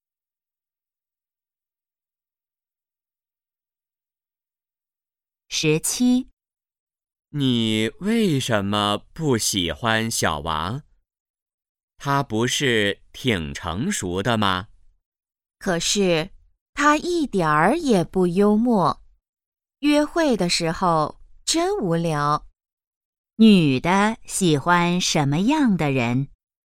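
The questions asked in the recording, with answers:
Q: 女的喜欢什么样的人?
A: 幽默的人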